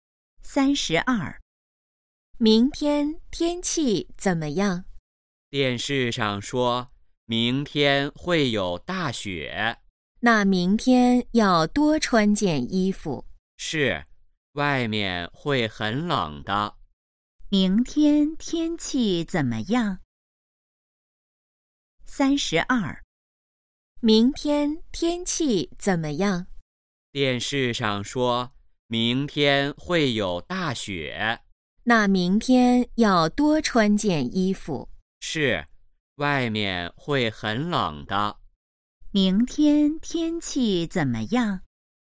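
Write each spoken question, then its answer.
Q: 明天天气怎么样?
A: 会有大雪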